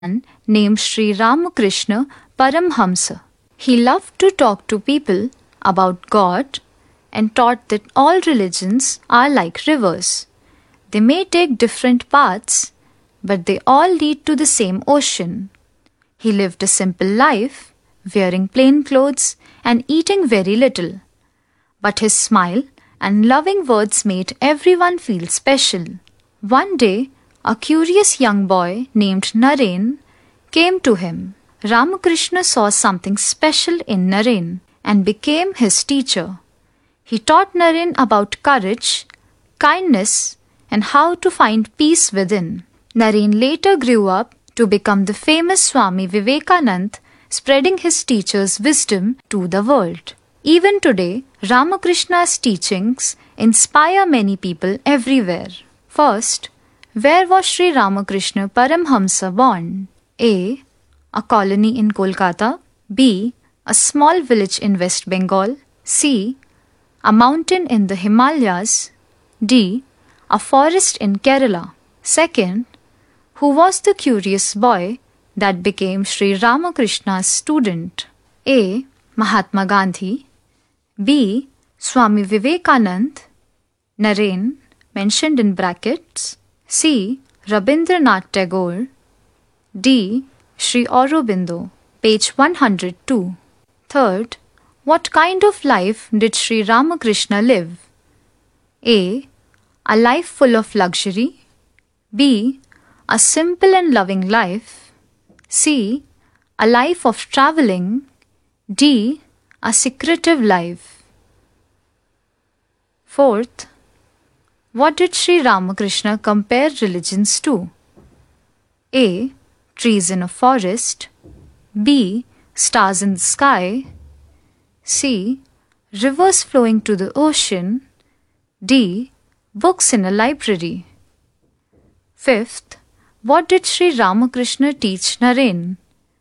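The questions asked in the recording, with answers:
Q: who was the curious boy that became Sri Ramakrishna's student?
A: B: Swami Vivekanand.

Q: what kind of life did Sri Ramakrishna live?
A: B: A simple and loving life.

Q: what did Sri Ramakrishna compare religions to?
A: C: Rivers flowing to the ocean.

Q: what did Sri Ramakrishna teach Naren?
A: D: To find peace.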